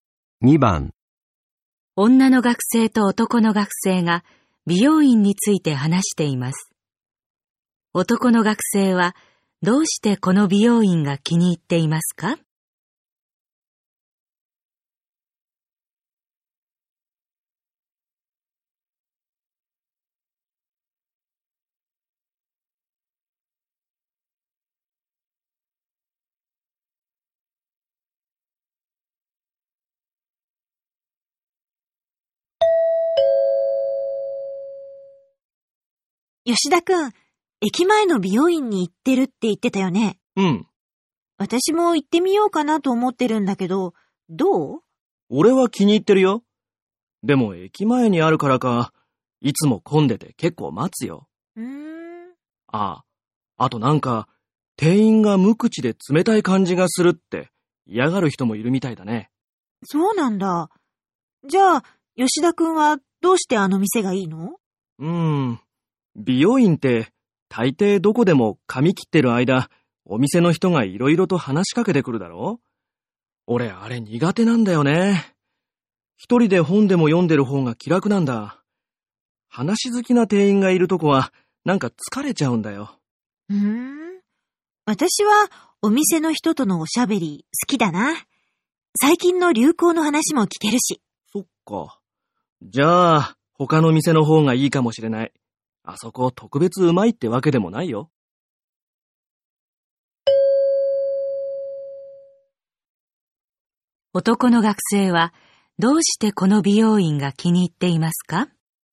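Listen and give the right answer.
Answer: 店員があまり話しかけてこないから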